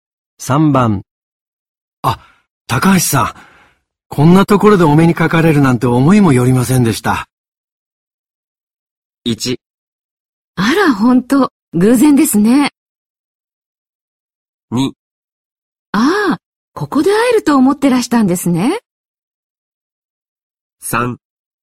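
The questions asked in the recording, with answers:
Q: あ、高橋さん、こんなところでお目にかかれるなんて思いもよりませんでした。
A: 1: あら、ほんと、偶然ですね。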